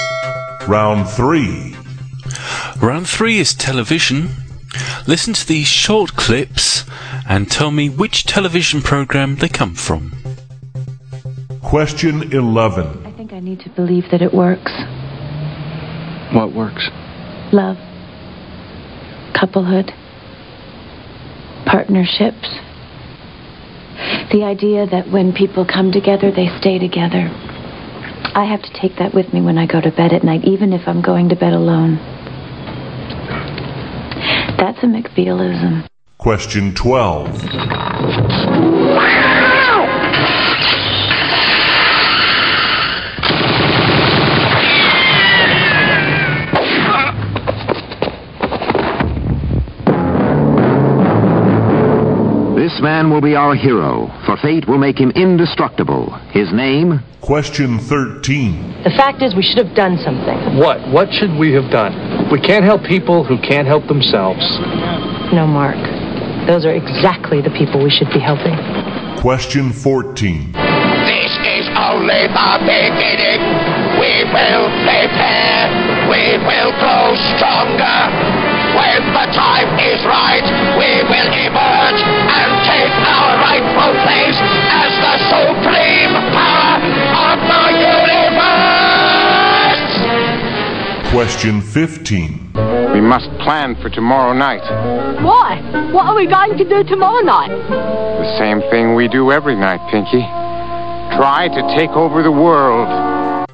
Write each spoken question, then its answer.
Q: Listen to these short clips and tell me which television program they come from.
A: the answer to number 11 was Ally McBeal

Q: Listen to these short clips and tell me which television program they come from.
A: number 15 was Pinky and the Brain